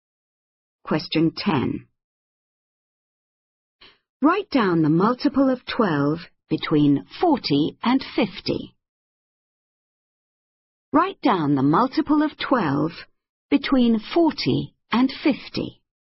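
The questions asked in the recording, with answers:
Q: Write down the multiple of 12 between 40 and 50.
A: 48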